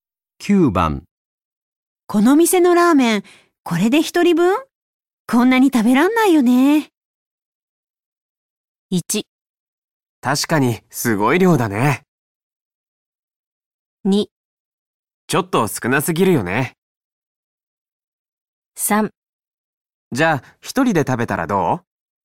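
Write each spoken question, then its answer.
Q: この店のラーメン、これで一人分?こんなに食べらんないよね。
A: 1: 確かにすごい量だね。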